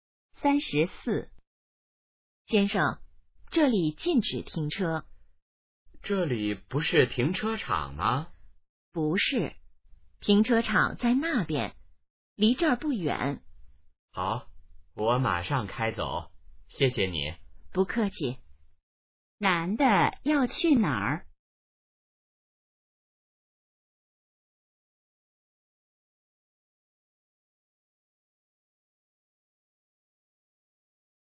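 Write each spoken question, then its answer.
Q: 男的要去哪儿?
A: 停车场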